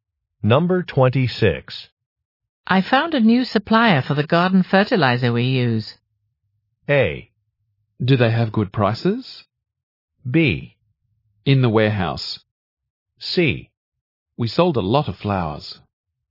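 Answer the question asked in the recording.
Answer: A: Do they have good prices?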